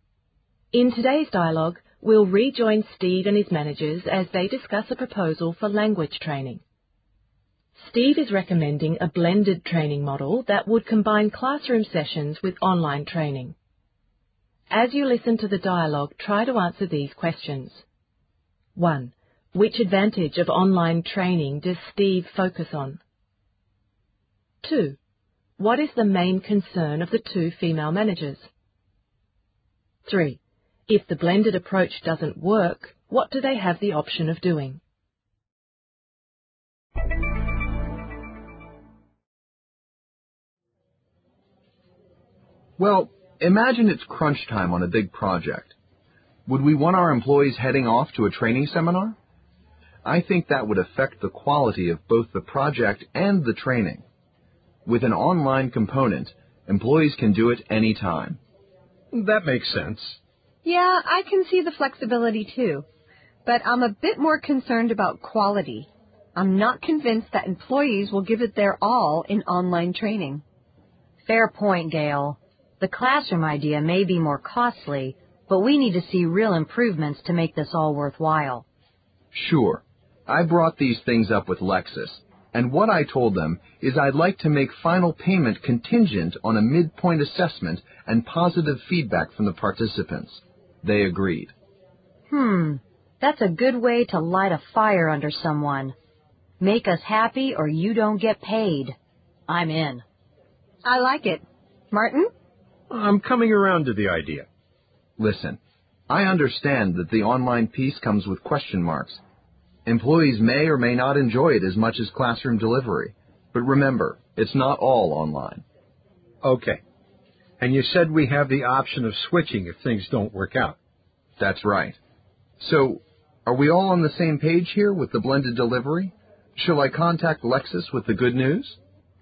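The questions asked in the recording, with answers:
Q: Which advantage of online training does Steve focus on?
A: Flexibility: employees can do it anytime

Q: What is the main concern of the two female managers?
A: Gail is concerned not about flexibility, but about quality.

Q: If the blended approach doesn't work, what do they have the option of doing?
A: Switching (to another approach)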